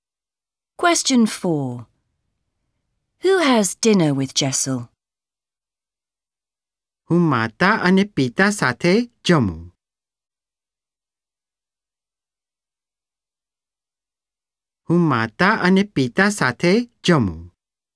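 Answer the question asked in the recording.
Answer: Mother and father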